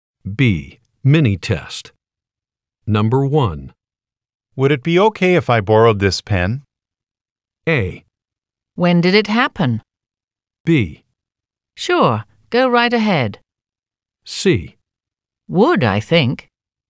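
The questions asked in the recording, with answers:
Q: Would it be okay if I borrowed this pen?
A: B: Sure, go right ahead.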